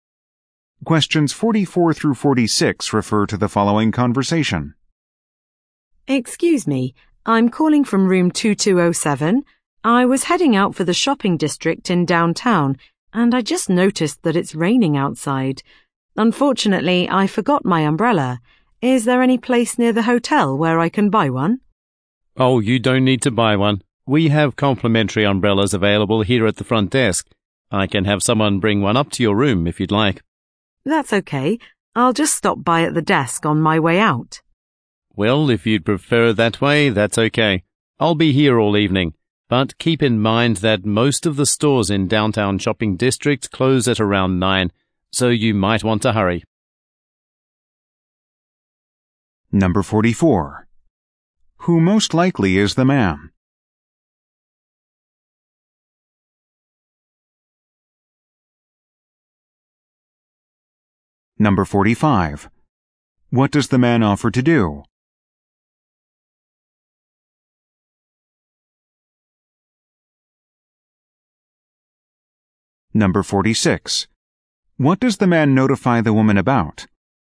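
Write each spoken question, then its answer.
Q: Who most likely is the man?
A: A hotel front desk clerk

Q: What does the man offer to do?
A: Have someone bring an umbrella to her room

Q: What does the man notify the woman about?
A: Most downtown stores close around 9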